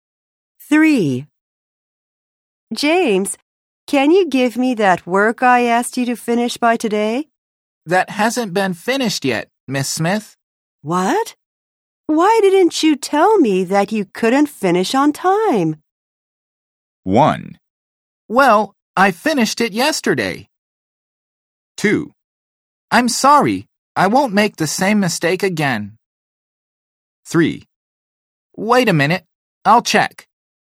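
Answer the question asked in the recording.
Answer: 2: I'm sorry, I won't make the same mistake again.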